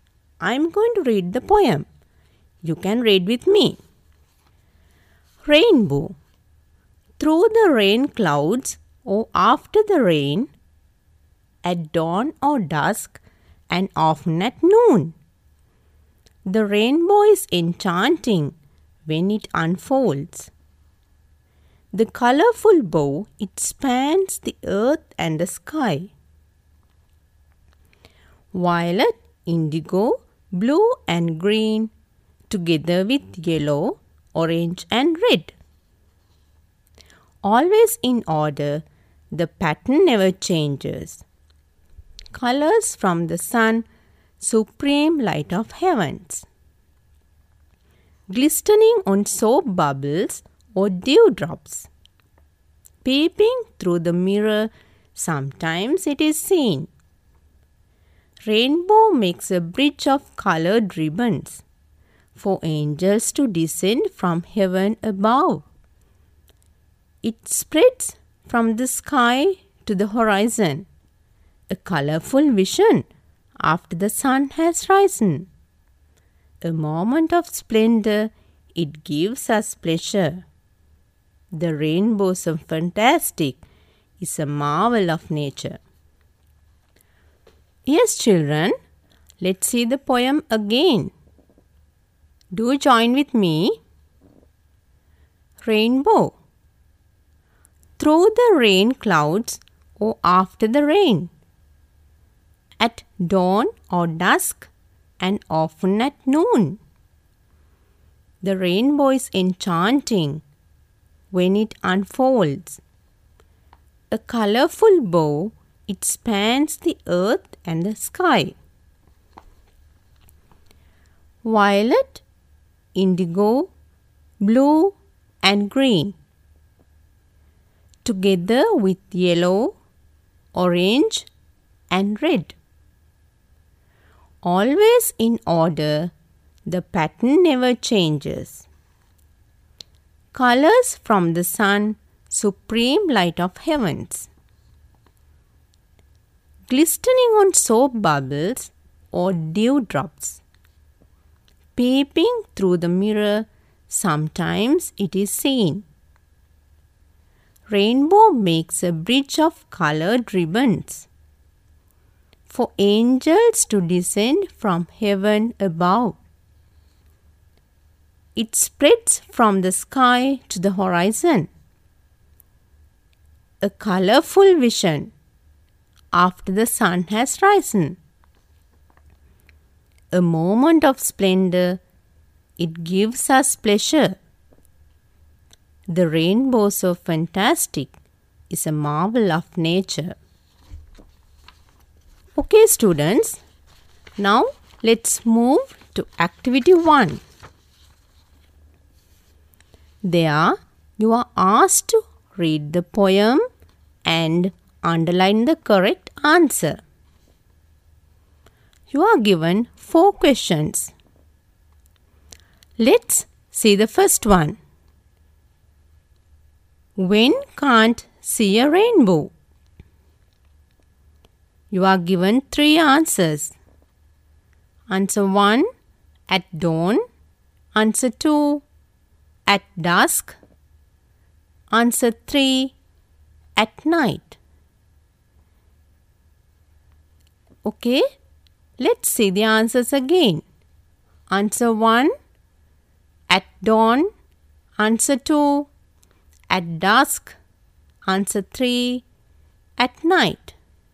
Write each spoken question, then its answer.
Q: When can't see a rainbow?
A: Yes, according to the poem, it's answer 3.